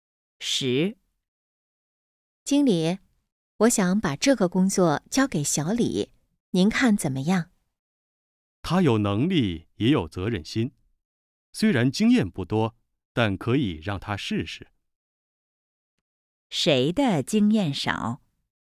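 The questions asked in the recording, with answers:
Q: 谁的经验少?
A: 小李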